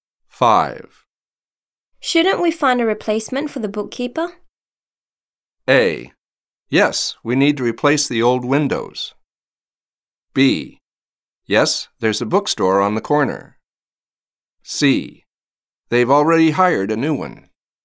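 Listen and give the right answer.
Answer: C: They've already hired a new one.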